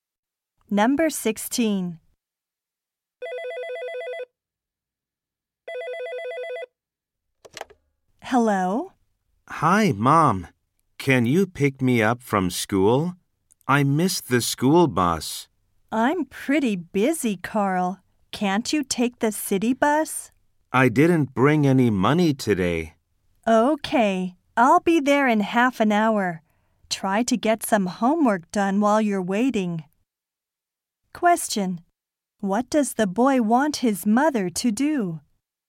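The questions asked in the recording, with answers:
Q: What does the boy want his mother to do?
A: Pick him up from school.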